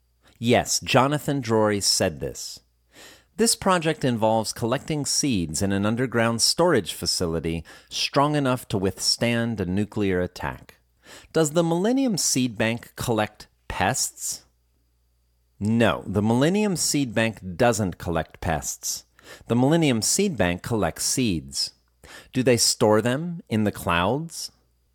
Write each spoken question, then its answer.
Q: Do they store them in the clouds?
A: No, they don't store them in the clouds.